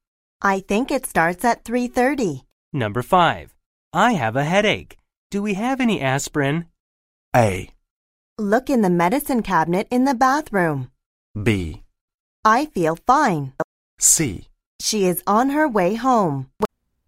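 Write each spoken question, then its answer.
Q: I have a headache. Do we have any aspirin?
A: A: Look in the medicine cabinet in the bathroom.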